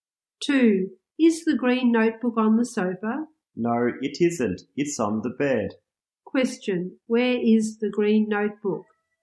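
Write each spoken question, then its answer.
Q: Question, where is the green notebook?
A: On the bed.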